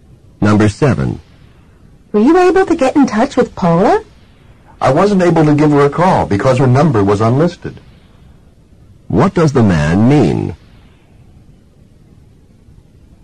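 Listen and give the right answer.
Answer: He couldn't call Paula because her number was unlisted.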